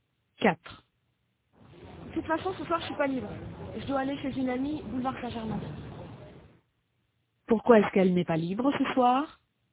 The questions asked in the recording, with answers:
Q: Pourquoi est-ce qu'elle n'est pas libre ce soir?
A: Parce qu'elle doit aller chez une amie, boulevard Saint-Germain.